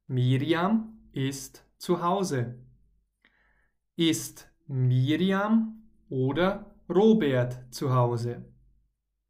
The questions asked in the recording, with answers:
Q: Ist Miriam oder Robert zu Hause?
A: Miriam. Wir sprechen von Miriam.